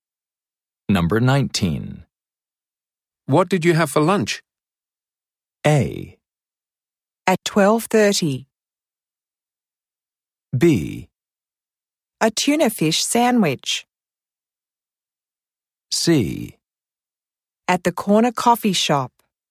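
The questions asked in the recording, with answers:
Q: What did you have for lunch?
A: B: A tuna fish sandwich.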